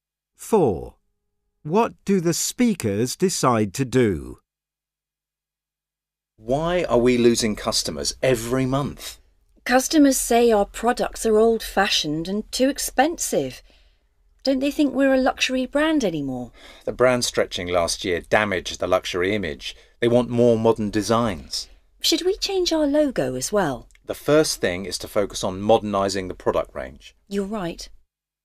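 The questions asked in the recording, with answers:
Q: What do the speakers decide to do?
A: Focus on modernising the product range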